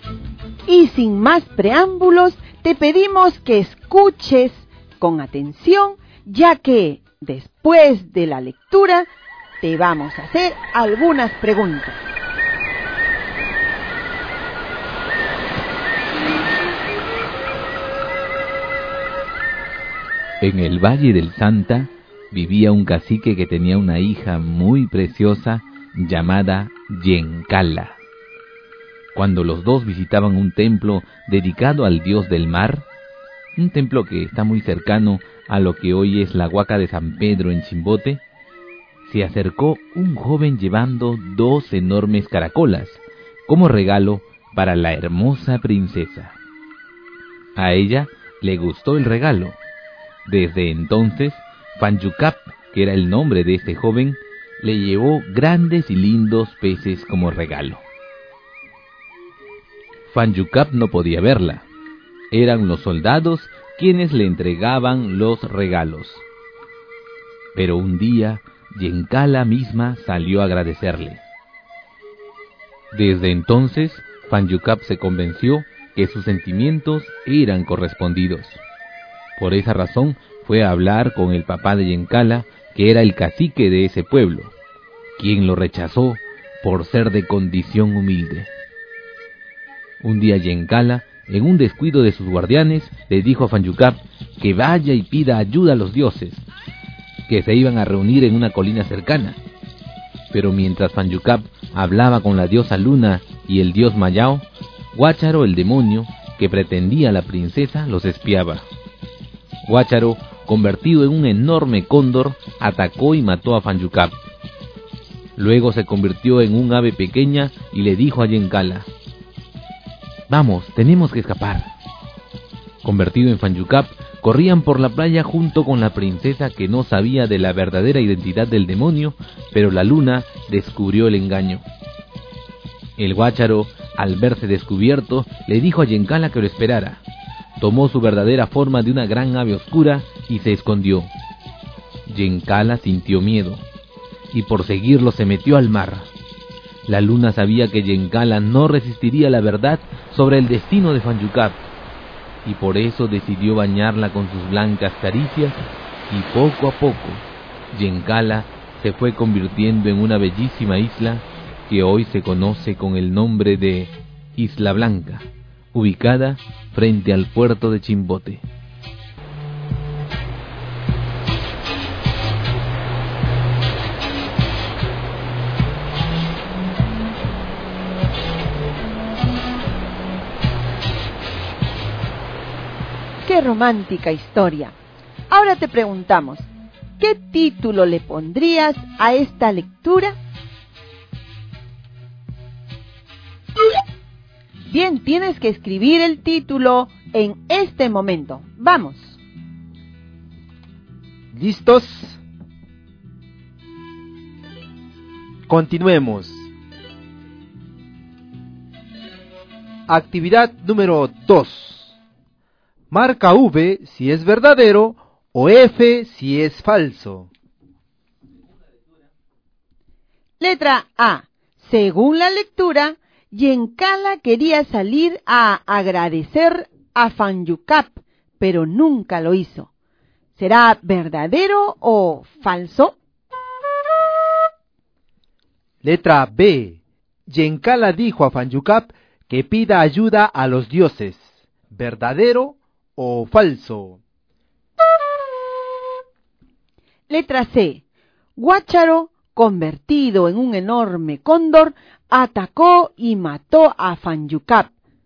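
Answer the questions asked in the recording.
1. Falso
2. Verdadero
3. Verdadero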